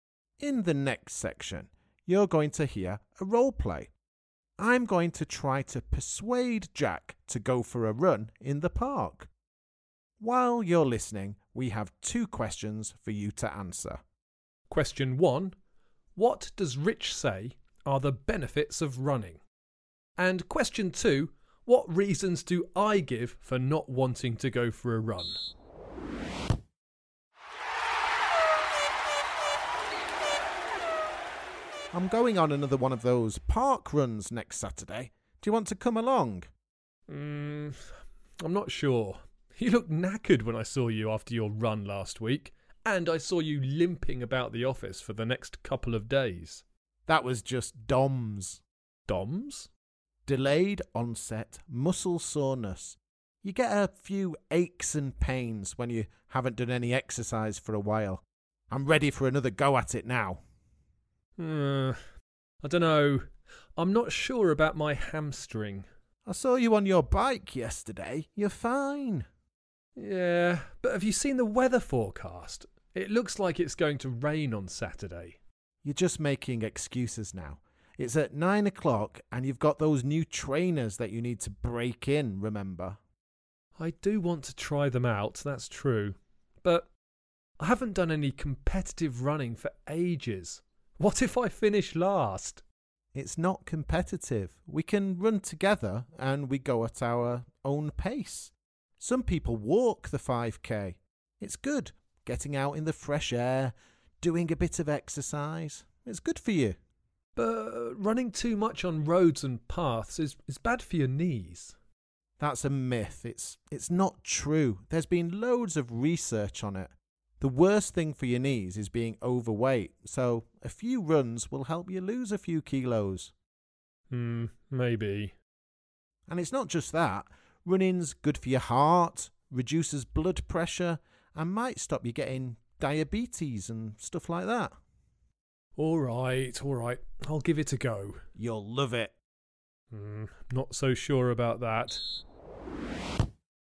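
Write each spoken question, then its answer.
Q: What does Rich say are the benefits of running?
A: Fresh air and exercise, losing weight (which helps your knees), good for the heart, lower blood pressure, and it may prevent diabetes

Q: what reasons do I give for not wanting to go for a run?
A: His hamstring, rain forecast for Saturday, he hasn't run competitively for ages and might finish last, and running is bad for the knees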